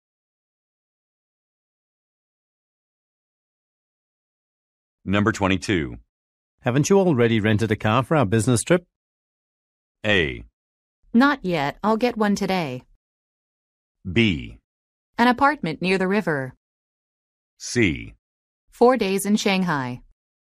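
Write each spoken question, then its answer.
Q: Haven't you already rented a car for our business trip?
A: A: Not yet. I'll get one today.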